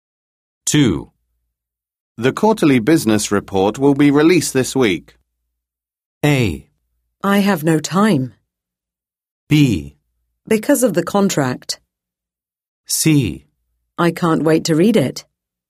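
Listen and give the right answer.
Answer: C: I can't wait to read it.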